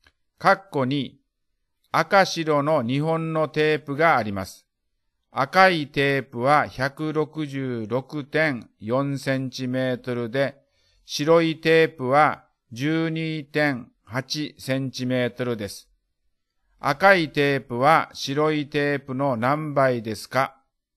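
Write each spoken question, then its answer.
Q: 赤いテープは白いテープの何倍ですか?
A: 13倍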